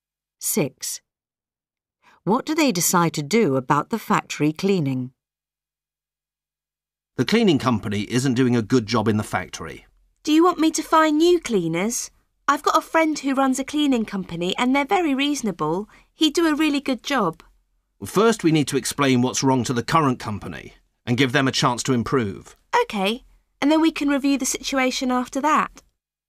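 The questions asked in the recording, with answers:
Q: What do they decide to do about the factory cleaning?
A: Explain the problems to the current company and give it a chance to improve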